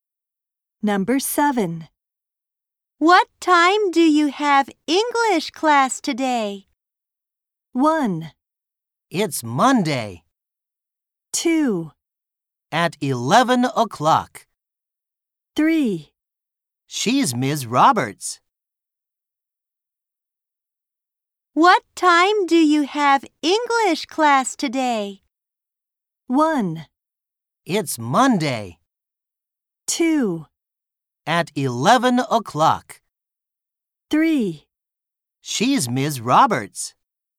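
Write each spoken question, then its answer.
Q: What time do you have English class today?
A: 2: At 11 o'clock.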